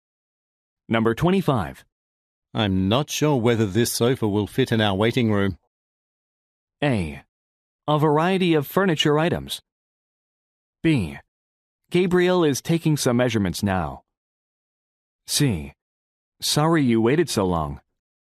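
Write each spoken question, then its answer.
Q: I'm not sure whether this sofa will fit in our waiting room.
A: B: Gabriel is taking some measurements now.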